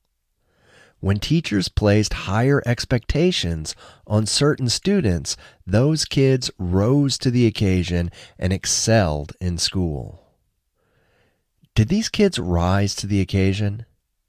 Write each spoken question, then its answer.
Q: Did these kids rise to the occasion?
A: Yes, they rose to the occasion.